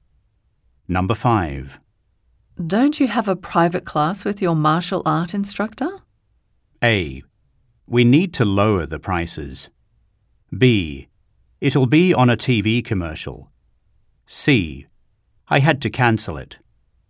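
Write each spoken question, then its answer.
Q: Don't you have a private class with your martial art instructor?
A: C: I had to cancel it.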